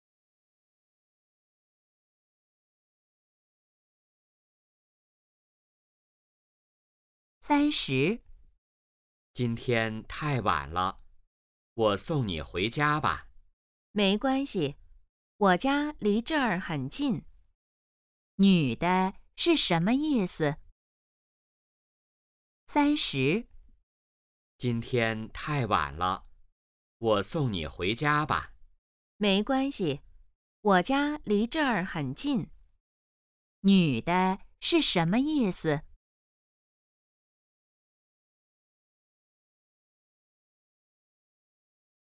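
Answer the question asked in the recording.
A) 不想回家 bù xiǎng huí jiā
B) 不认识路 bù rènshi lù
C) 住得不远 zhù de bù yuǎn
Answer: C) 住得不远 zhù de bù yuǎn

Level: HSK2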